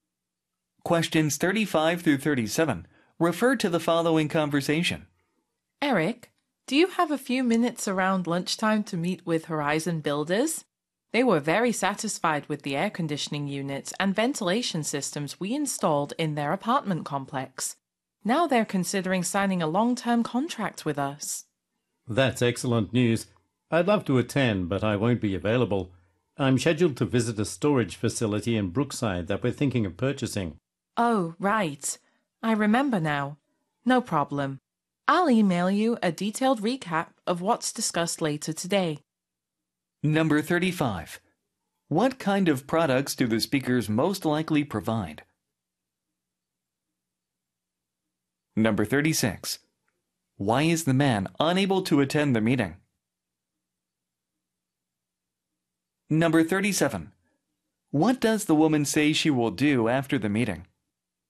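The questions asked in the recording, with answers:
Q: What kind of products do the speakers most likely provide?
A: Air conditioning and ventilation systems

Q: Why is the man unable to attend the meeting?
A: He is visiting a storage facility in Brookside that they may buy

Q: What does the woman say she will do after the meeting?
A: Email him a detailed recap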